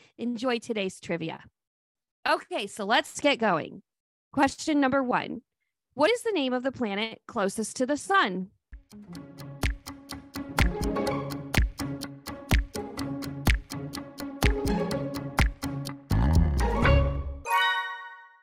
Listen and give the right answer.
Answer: That would be Mercury.